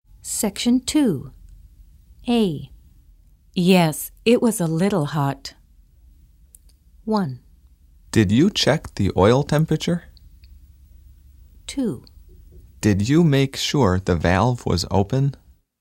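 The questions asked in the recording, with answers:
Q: Yes, it was a little hot.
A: 1: Did you check the oil temperature?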